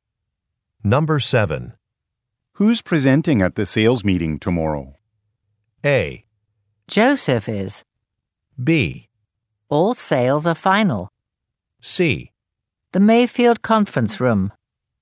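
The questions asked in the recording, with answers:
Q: Who's presenting at the sales meeting tomorrow?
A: A: Joseph is.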